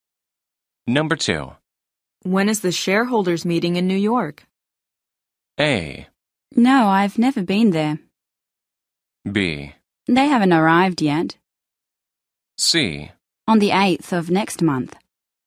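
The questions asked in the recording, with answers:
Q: When is the shareholders' meeting in New York?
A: C: On the 8th of next month.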